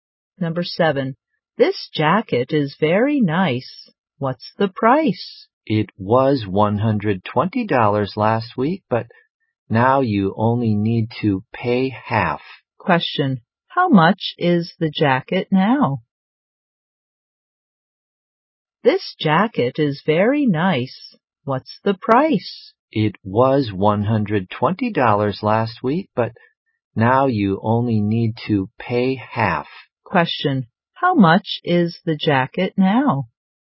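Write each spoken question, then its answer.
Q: Question, how much is the jacket now?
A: $60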